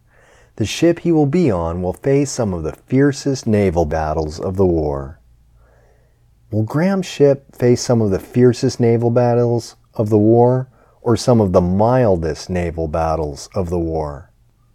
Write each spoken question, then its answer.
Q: Will Graham's ship face some of the fiercest naval battles of the war, or some of the mildest naval battles of the war?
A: Graham's ship will face some of the fiercest naval battles of the war.